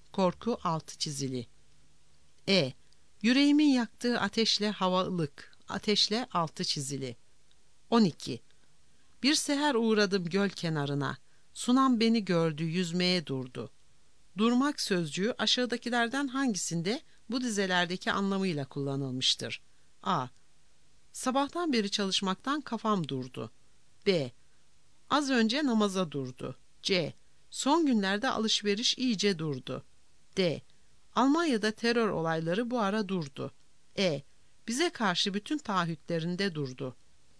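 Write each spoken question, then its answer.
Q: Durmak sözcüğü aşağıdakilerden hangisinde bu dizelerdeki anlamıyla kullanılmıştır?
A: B: Az önce namaza durdu.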